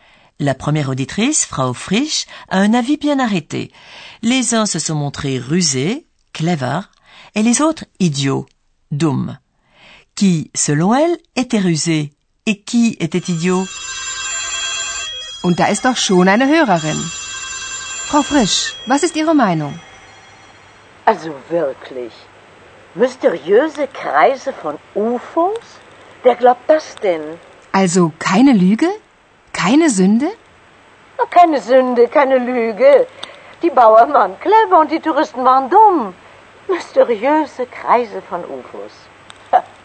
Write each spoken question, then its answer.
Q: Qui, selon elle, était rusé et qui était idiot?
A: De l'avis de Frau Frisch, les paysans, Bauern, ont été rusés et les touristes idiots.